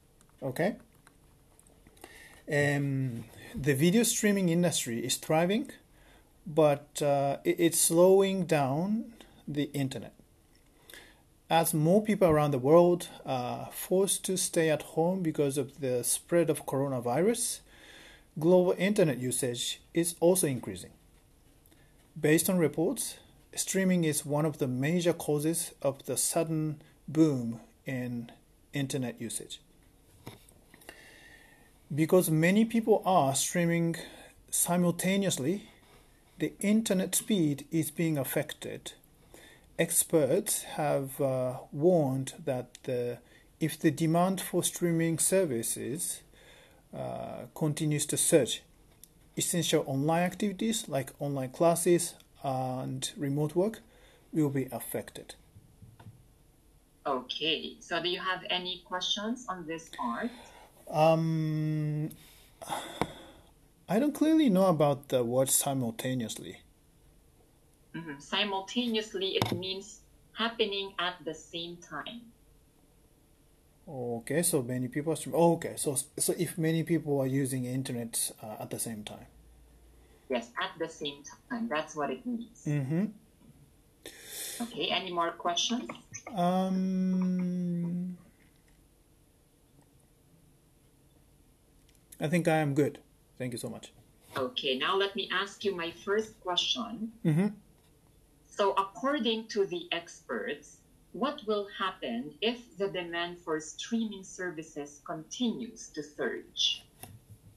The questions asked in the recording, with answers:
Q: So, according to the experts, what will happen if the demand for streaming services continues to surge?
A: Um, so, the essential online acti- activities like online classes and working remotely uh, will be affected by that.